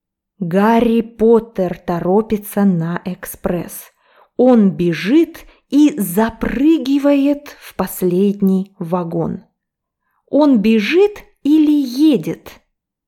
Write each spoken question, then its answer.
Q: Он бежит или едет?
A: Он бежит.